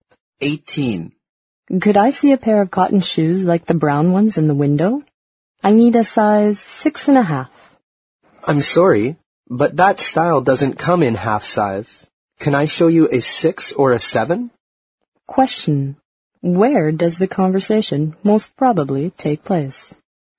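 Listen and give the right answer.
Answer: In a shoe store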